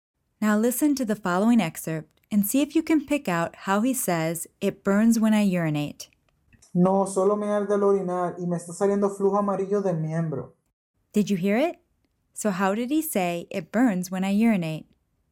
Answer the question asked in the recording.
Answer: Me arde al orinar.